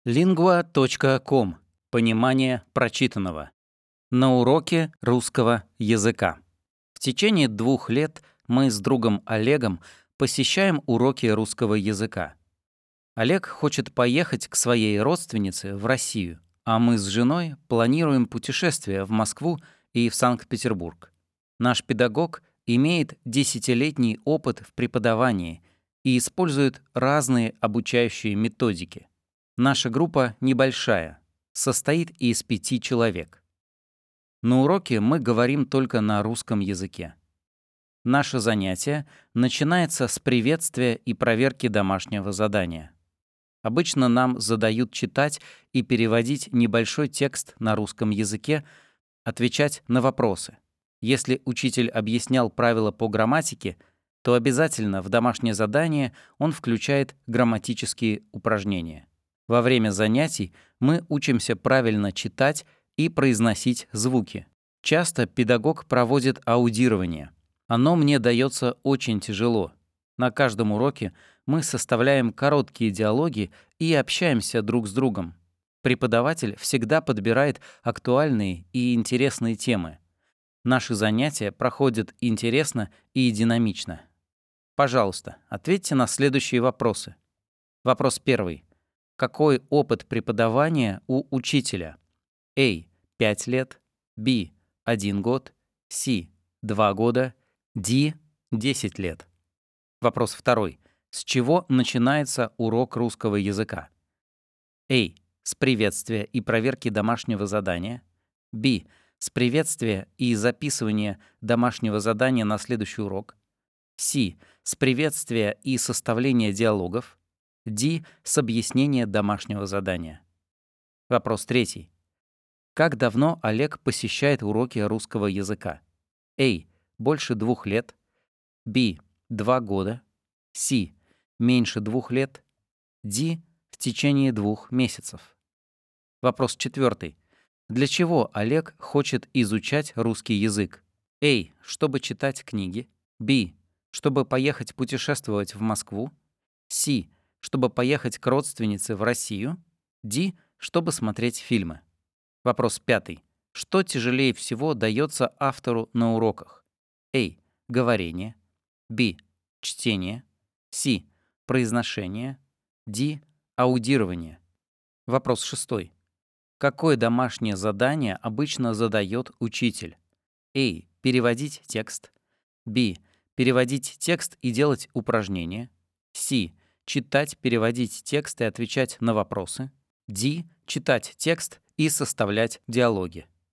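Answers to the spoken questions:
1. D: 10 лет
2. A: С приветствия и проверки домашнего задания
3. B: 2 года
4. C: Чтобы поехать к родственнице в Россию
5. D: Аудирование
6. C: Читать, переводить текст и отвечать на вопросы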